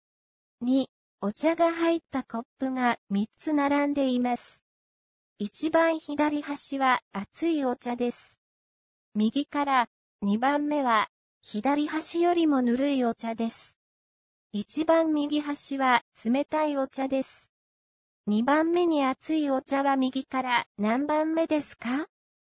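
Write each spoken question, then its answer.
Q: 2番目に熱いお茶は右から何番目ですか?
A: 右から2番目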